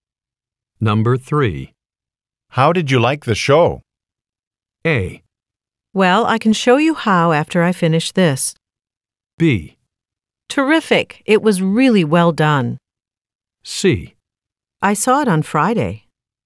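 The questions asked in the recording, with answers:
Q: How did you like the show?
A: B: Terrific! It was really well done.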